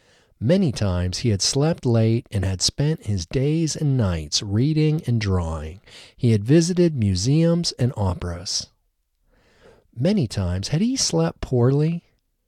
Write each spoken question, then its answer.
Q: Many times had he slept poorly?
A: No, he hadn't slept poorly.